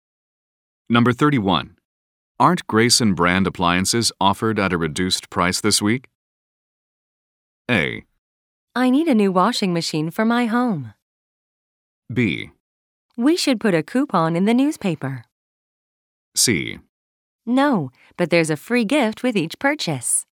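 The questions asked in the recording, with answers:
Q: Aren't Grayson brand appliances offered at a reduced price this week?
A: C: No, but there's a free gift with each purchase.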